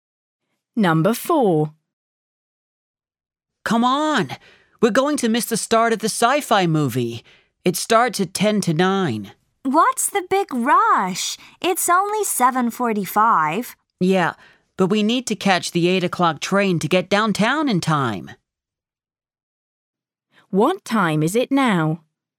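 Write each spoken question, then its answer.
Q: What time is it now?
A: 7:45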